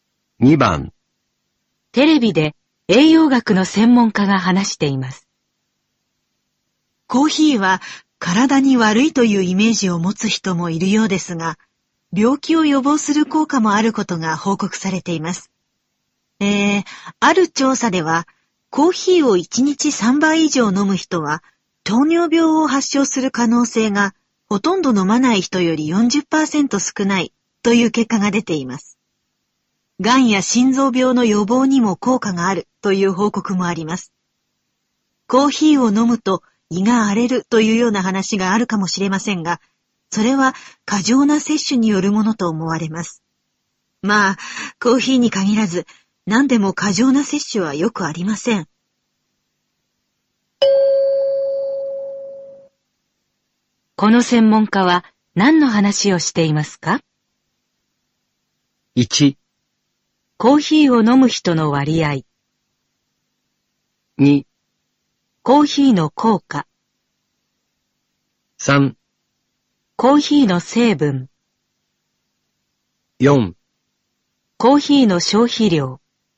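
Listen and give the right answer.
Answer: 2: コーヒーの効果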